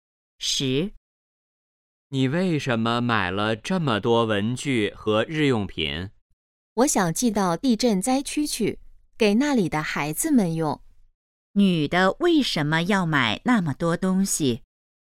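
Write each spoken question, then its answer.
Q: 女的为什么要买那么多东西?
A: 寄给地震灾区的孩子们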